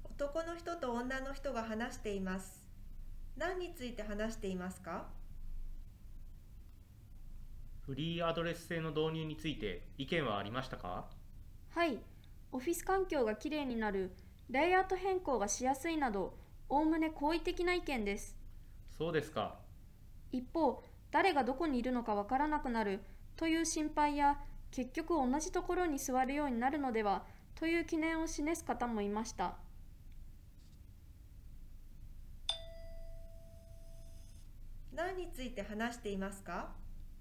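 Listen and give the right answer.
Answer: フリーアドレス制の導入に対する意見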